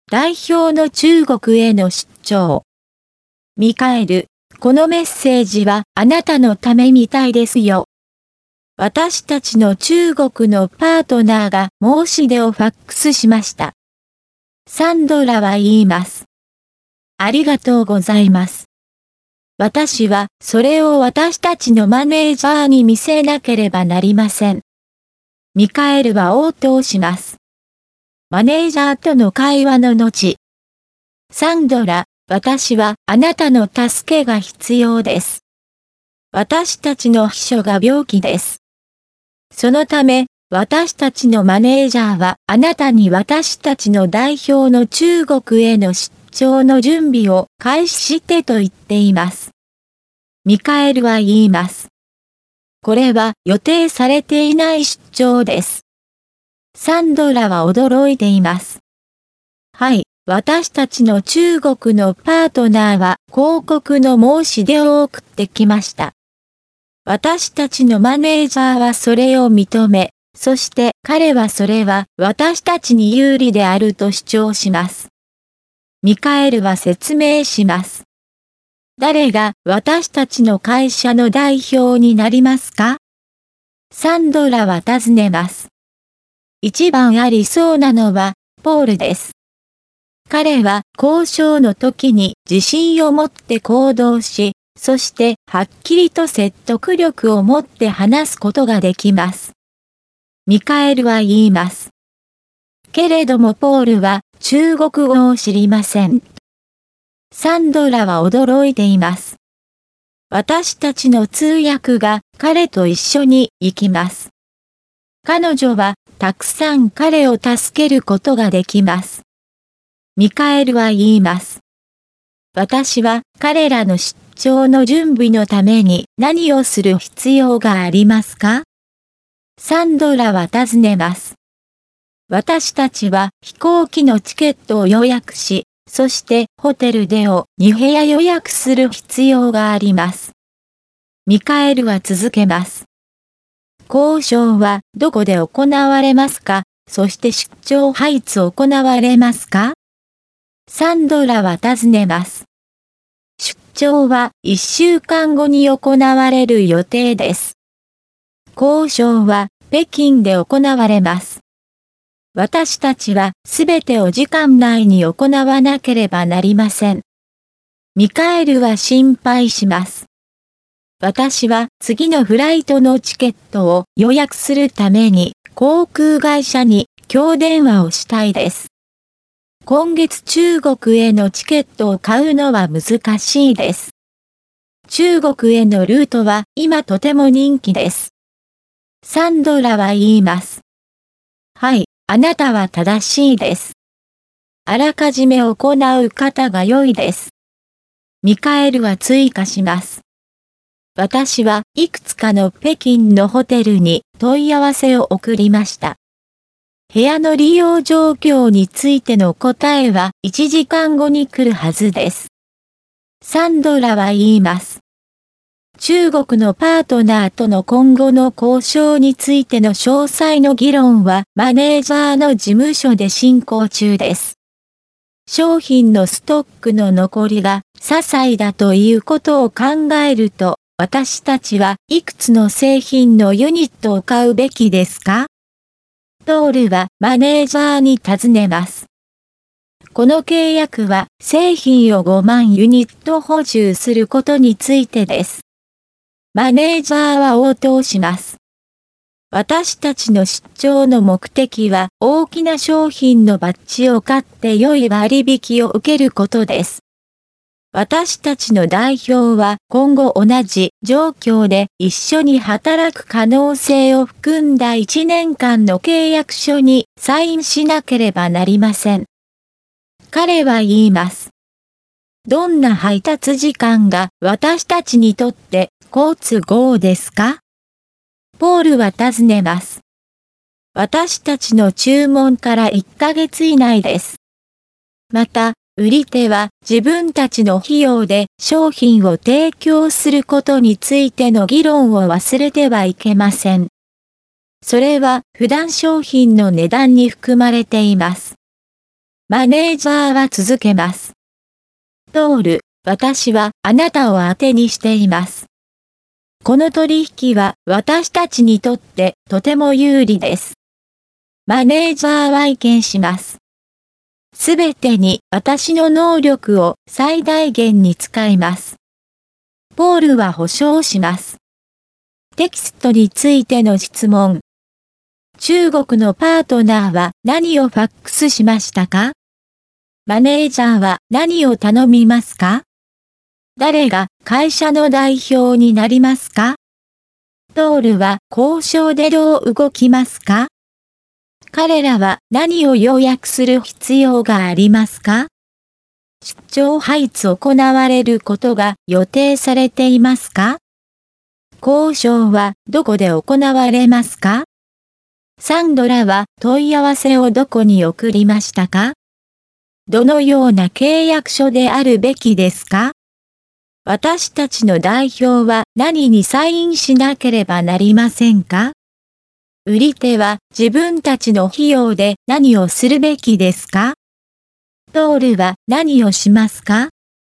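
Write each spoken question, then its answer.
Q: 中国のパートナーは何をファックスしましたか?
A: 広告の申し出

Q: マネージャーは何を頼みますか?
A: 代表の中国への出張の準備を開始すること

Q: 誰が会社の代表になりますか?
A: ポール

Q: トールは交渉でどう動きますか?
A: 自信を持って行動し、はっきりと説得力を持って話す

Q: 出張配置行われることが予定されていますか?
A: 1週間後

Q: 交渉はどこで行われますか?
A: 北京

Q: サンドラは問い合わせをどこに送りましたか?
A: いくつかの北京のホテル

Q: 私たちの代表は何にサインしなければなりませんか?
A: 1年間の契約書

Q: 売り手は自分たちの費用で何をするべきですか?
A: 商品を提供する(配達する)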